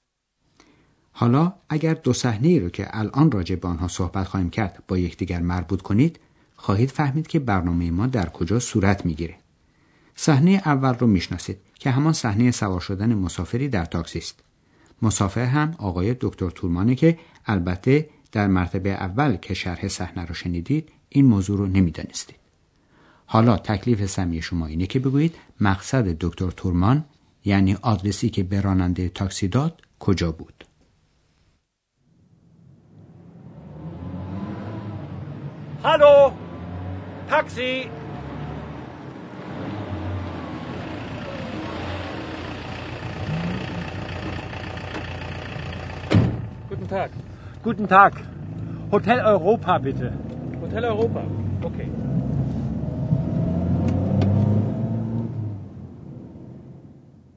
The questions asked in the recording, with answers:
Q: حالا تکلیف سمی شما اینه که بگویید مقصد دکتر تورمان یعنی آدرسی که به راننده تاکسی داد کجا بود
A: پس دکتر تورمان میخواست که راننده تاکسی او رو به هتل اروپا، هتل اوروپا ببره.